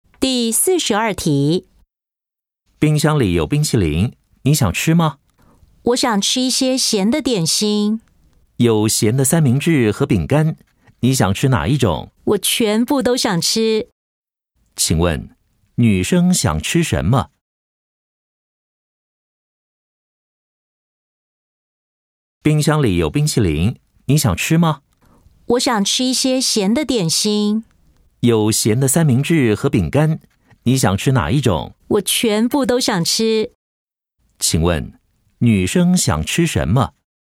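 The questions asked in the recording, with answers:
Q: 请问,女生想吃什么?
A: 咸的三明治和饼干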